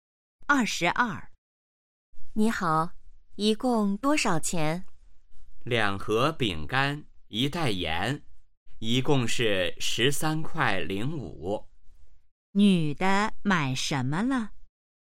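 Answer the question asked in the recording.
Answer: 饼干和盐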